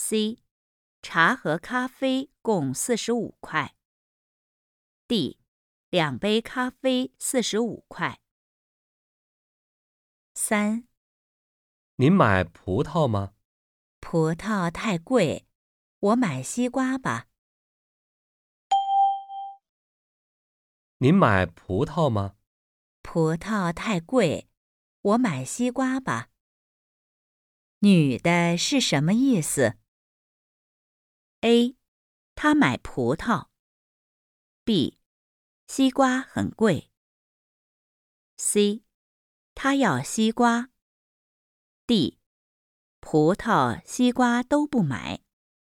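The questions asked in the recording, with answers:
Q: 女的是什么意思?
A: C: 她要西瓜。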